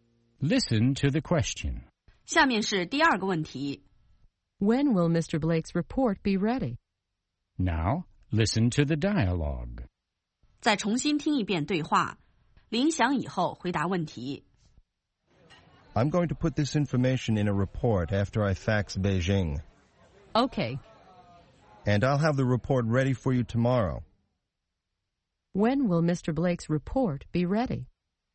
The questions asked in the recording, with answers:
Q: When will Mr. Blake's report be ready?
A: It will be ready tomorrow.